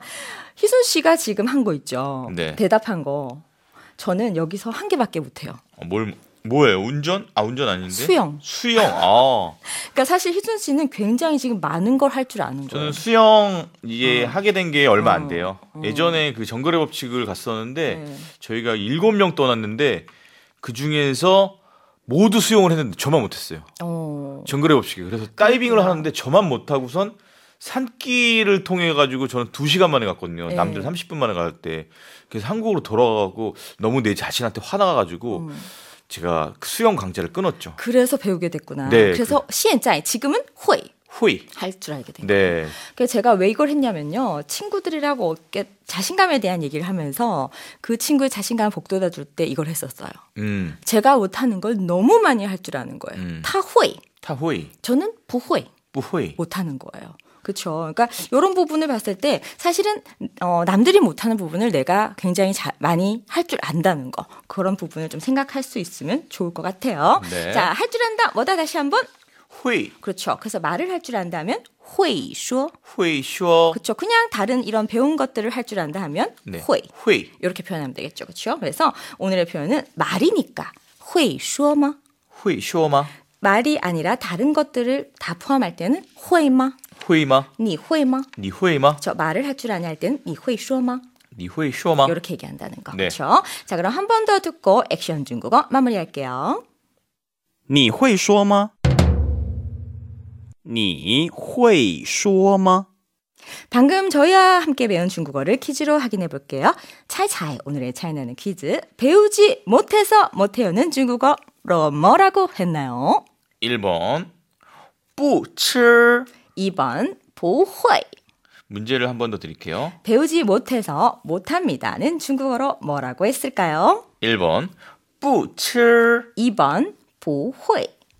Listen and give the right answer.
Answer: 2번 不会.